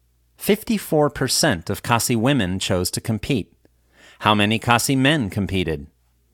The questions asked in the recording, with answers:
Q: How many Khasi men competed?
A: 39% of Khasi men competed.